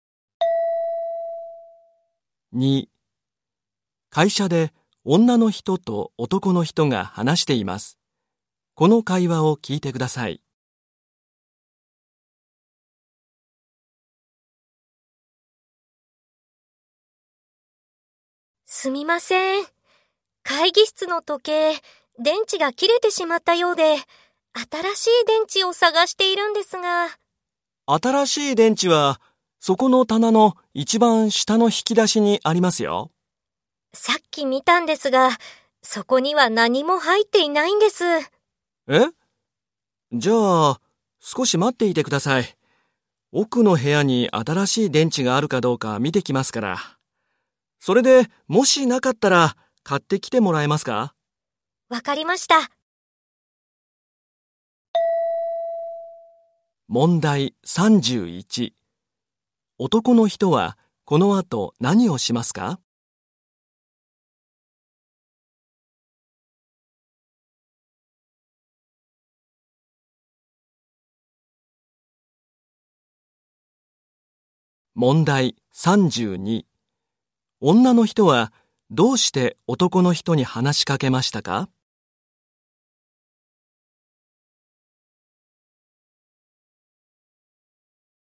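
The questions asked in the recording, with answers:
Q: 男の人は、この後何をしますか?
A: 奥の部屋に新しい電池があるか見に行く

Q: 女の人はどうして男の人に話しかけましたか?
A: 時計の新しい電池を探していたから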